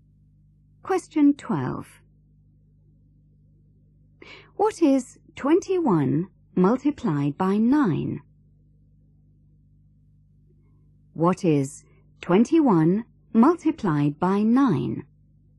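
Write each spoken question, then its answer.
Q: What is 21 multiplied by 9?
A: 189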